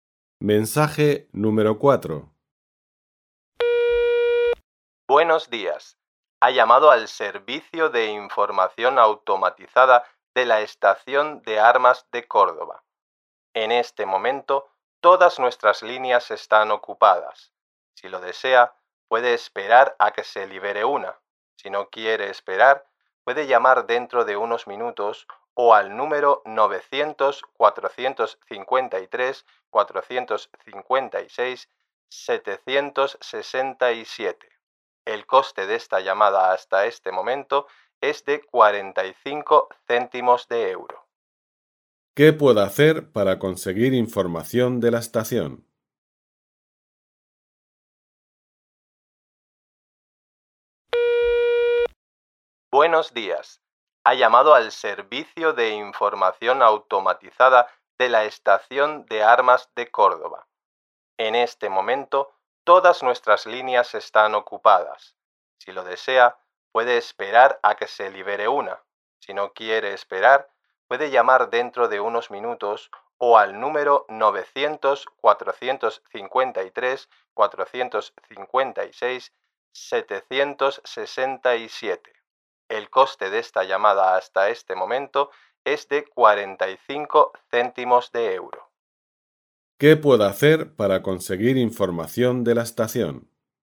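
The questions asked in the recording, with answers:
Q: ¿Qué puedo hacer para conseguir información de la estación?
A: Esperar, llamar dentro de unos minutos o llamar al 900-453-456-767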